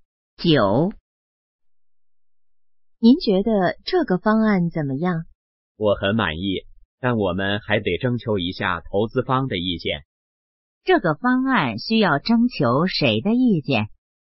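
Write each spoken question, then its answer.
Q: 这个方案需要征求谁的意见?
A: 投资方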